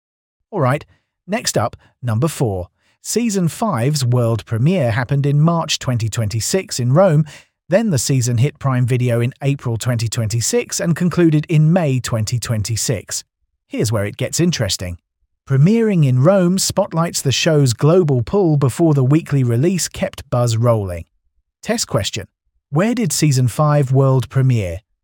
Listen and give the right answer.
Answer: Rome.